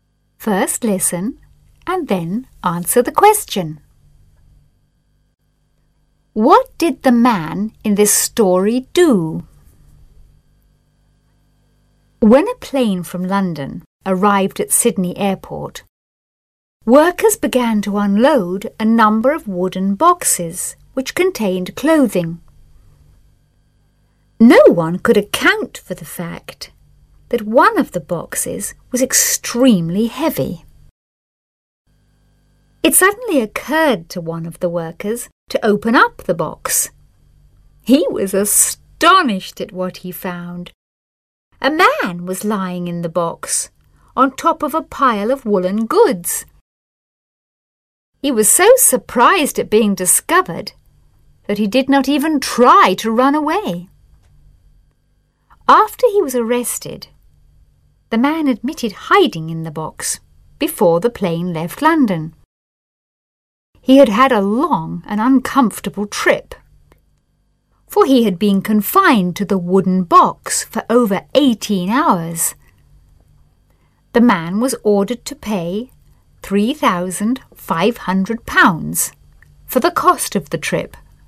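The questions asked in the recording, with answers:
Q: What did the man in this story do?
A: He hid in a wooden box on a plane from London to Sydney to travel without a ticket.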